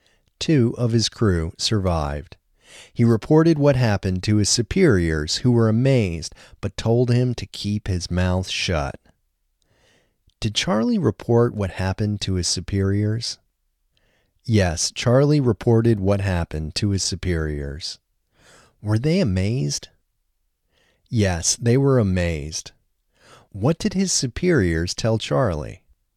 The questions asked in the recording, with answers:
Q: What did his superiors tell Charlie?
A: His superiors told Charlie to keep his mouth shut.